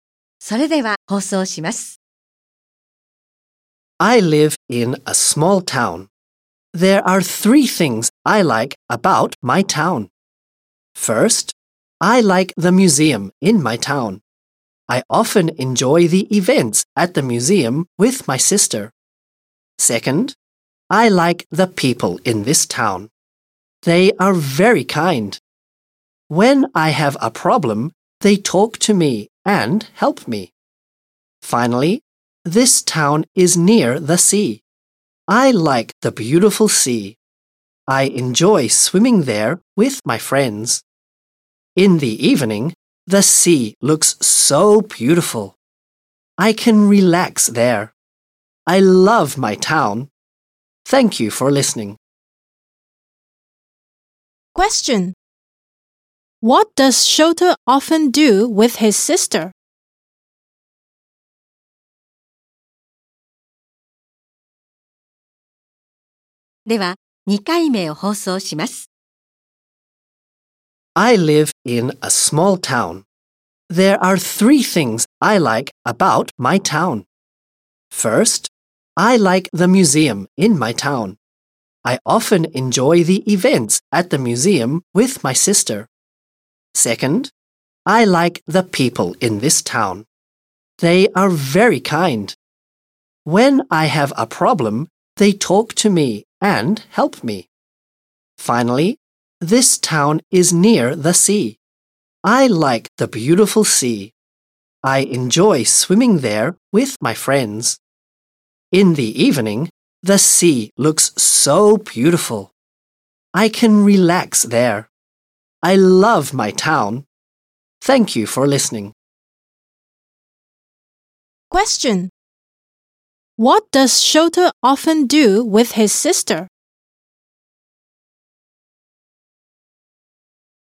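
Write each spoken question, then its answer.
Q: What does Shota often do with his sister?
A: He enjoys the events at the museum.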